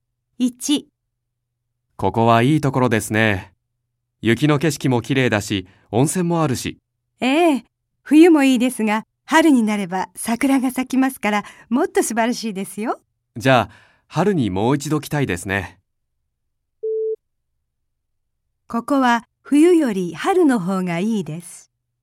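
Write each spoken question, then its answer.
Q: ここは冬より春の方がいいです。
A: ○(正しい)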